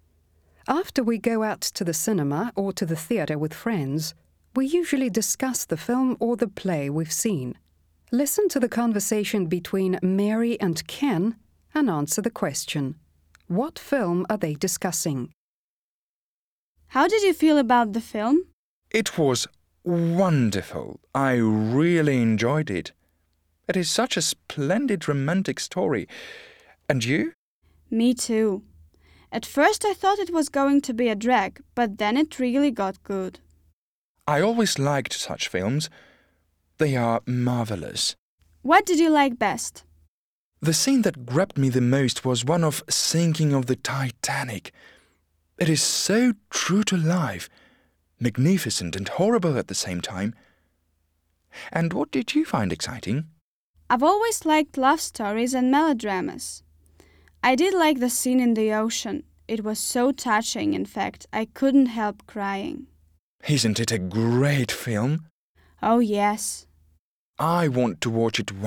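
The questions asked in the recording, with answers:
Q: What film are they discussing?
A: Titanic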